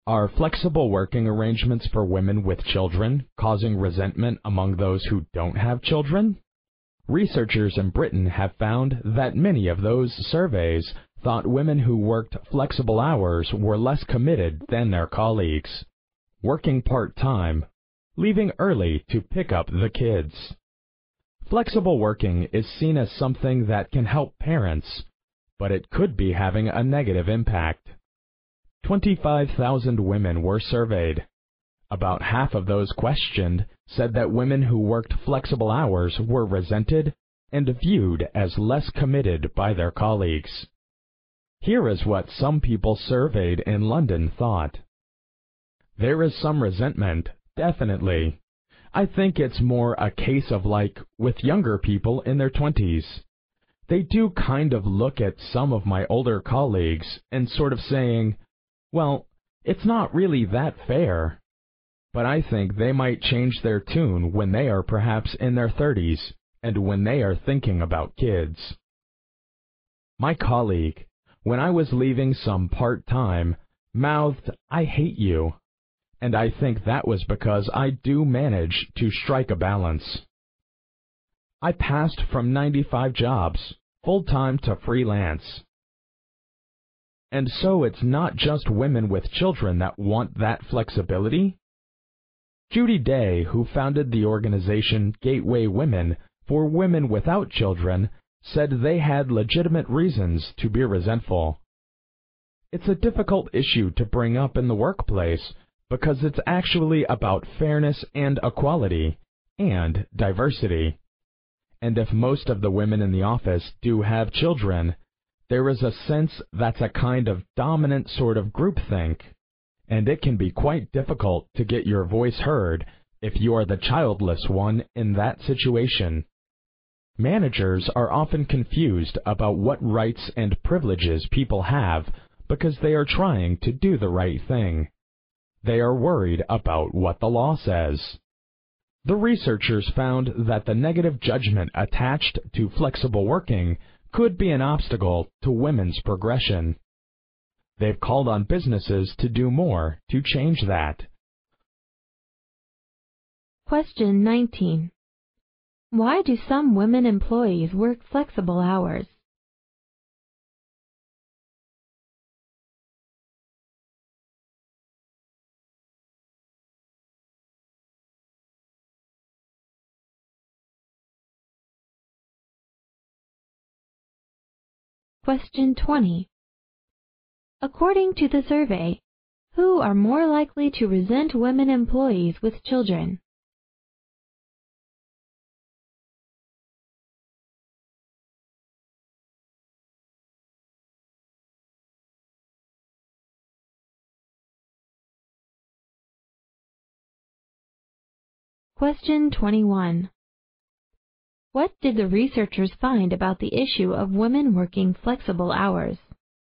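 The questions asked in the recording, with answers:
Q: What did the researchers find about the issue of women working flexible hours?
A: The negative judgment could be an obstacle to women's progression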